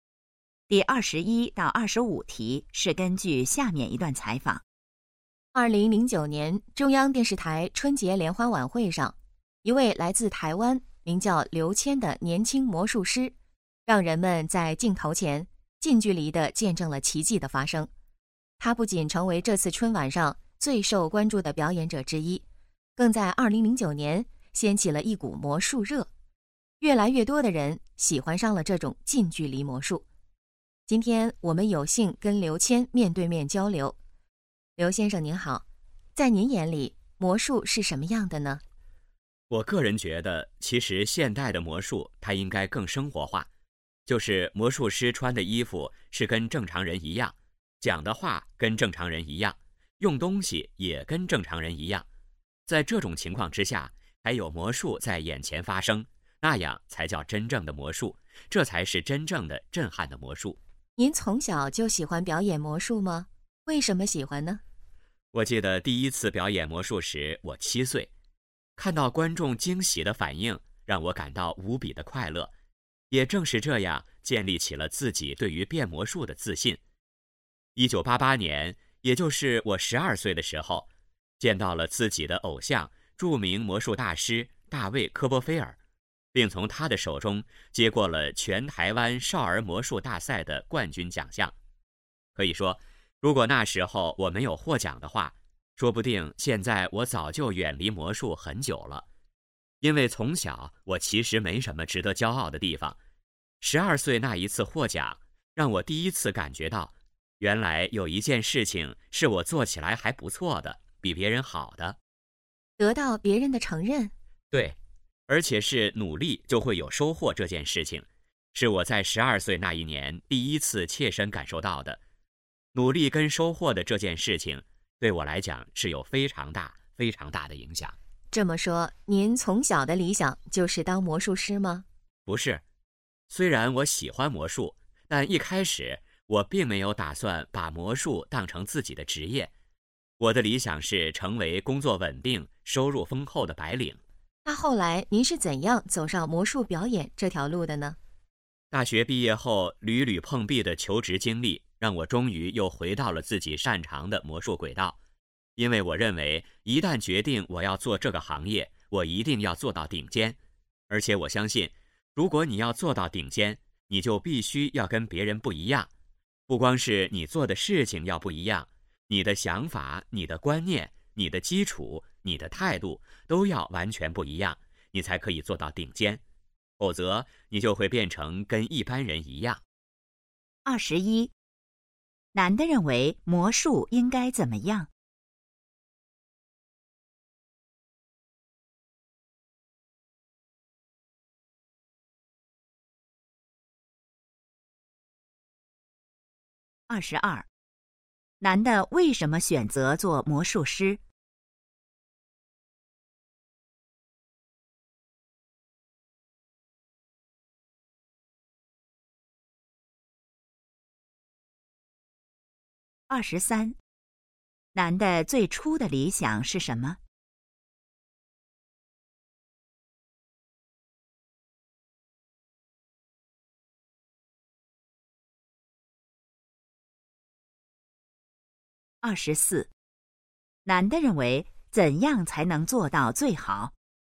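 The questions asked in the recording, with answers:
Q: 男的认为魔术应该怎么样?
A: 更生活化

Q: 男的为什么选择做魔术师?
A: 大学毕业后求职屡屡碰壁

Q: 男的最初的理想是什么?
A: 成为工作稳定、收入丰厚的白领

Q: 男的认为怎样才能做到最好?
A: 必须跟别人不一样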